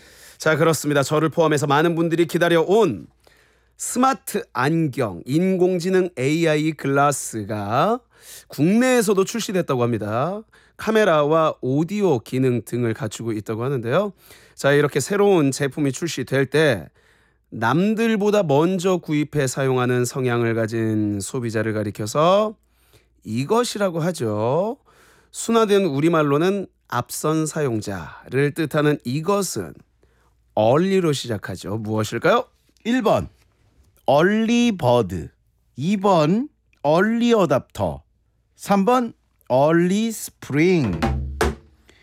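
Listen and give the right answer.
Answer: 2: 얼리어답터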